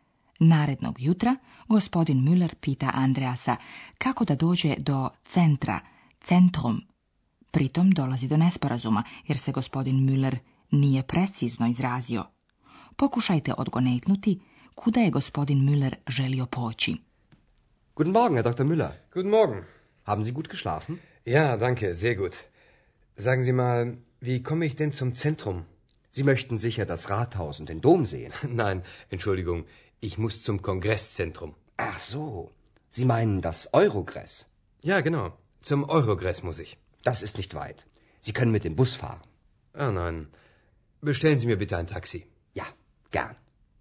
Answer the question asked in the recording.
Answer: Gospodin Müller nije želio u centar Aachena, već u njegov kongresni centar, koji se u Aachenu zove Eurogress.